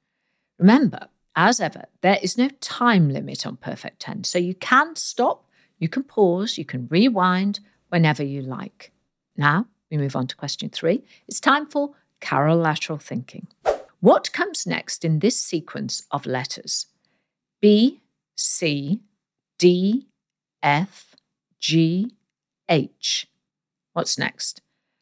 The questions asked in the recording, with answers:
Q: What comes next in this sequence of letters?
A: And the answer is J.